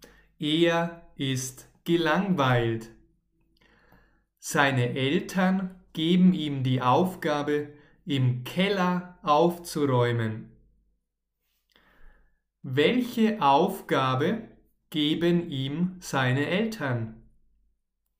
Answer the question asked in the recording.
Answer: Im Keller aufzuräumen.